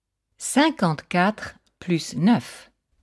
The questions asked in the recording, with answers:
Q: 54 plus 9.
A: Ça fait 63.